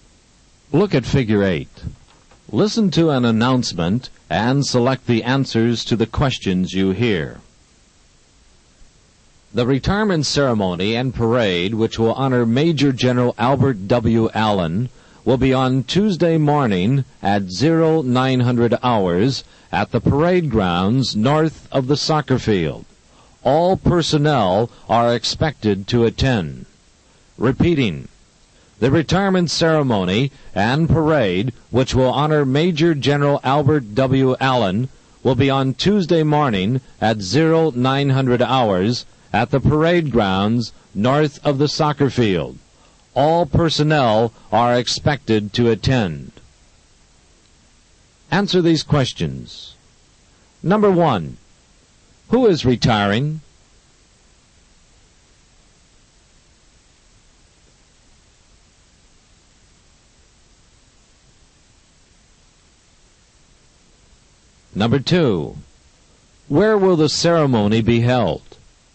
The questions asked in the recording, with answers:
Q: who is retiring?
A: Number one is B, Major General Allen.

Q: where will the ceremony be held?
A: Number two is C, the North Parade Grounds.